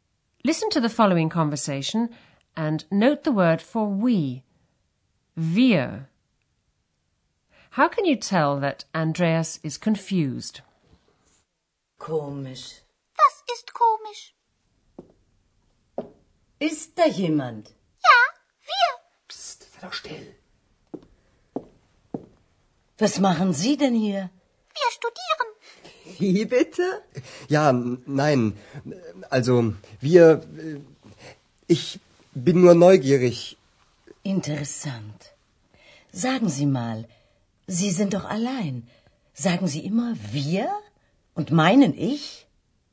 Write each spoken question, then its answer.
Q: How can you tell that Andreas is confused?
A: He begins to stutter.